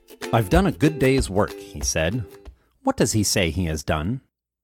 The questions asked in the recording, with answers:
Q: What does he say he has done?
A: He says he has done a good day's work.